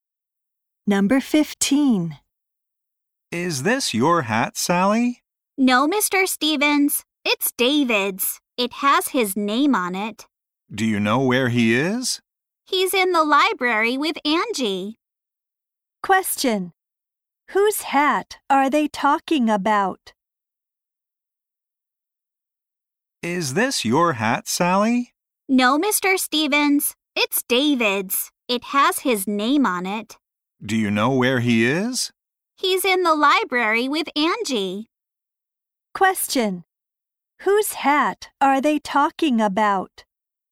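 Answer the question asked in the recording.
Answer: David's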